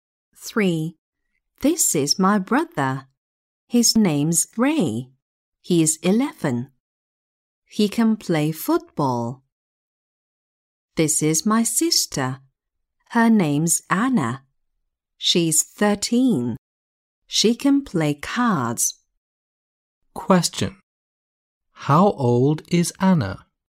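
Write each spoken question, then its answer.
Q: How old is Anna?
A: 13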